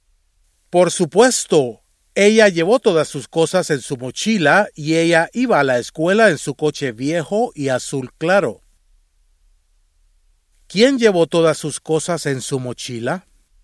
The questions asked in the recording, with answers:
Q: ¿Quién llevó todas sus cosas en su mochila?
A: Ana llevó todas sus cosas en su mochila.